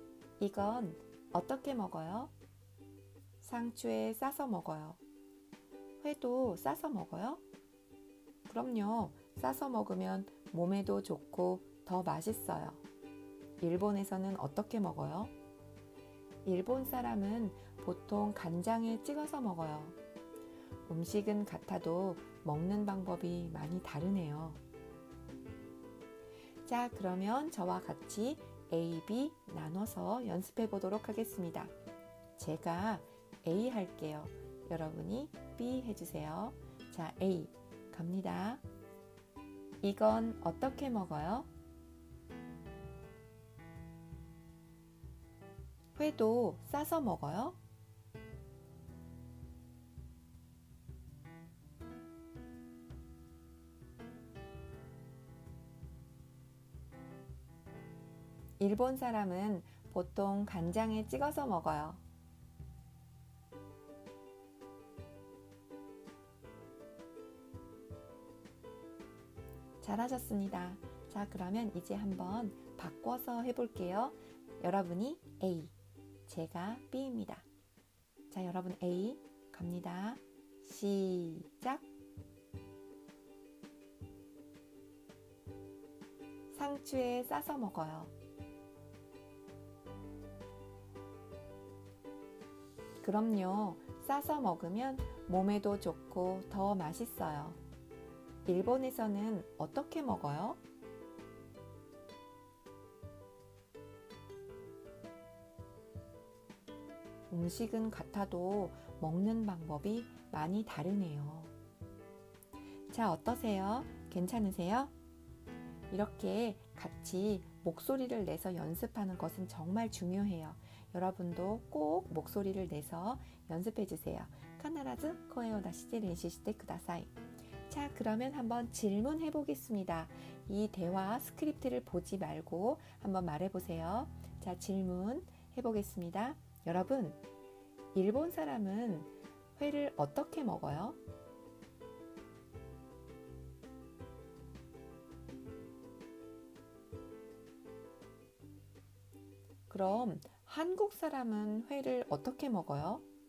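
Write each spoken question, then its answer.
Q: 여러분, 일본 사람은 회를 어떻게 먹어요?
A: 간장에 찍어서 먹어요

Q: 그럼 한국 사람은 회를 어떻게 먹어요?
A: 상추에 싸서 먹어요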